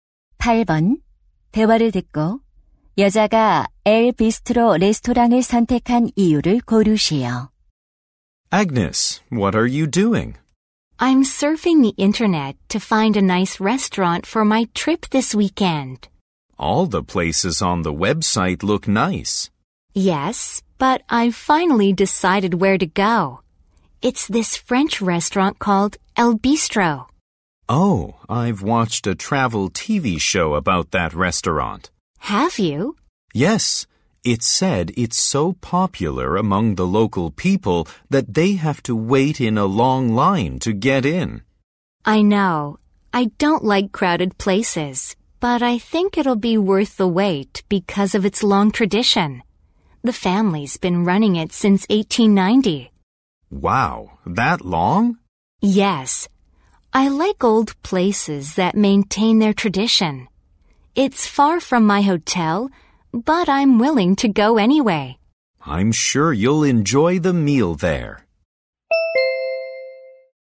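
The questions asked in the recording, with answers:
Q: 대화를 듣고 여자가 엘 비스트로 레스토랑을 선택한 이유를 고르시오.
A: 오랜 전통이 있어서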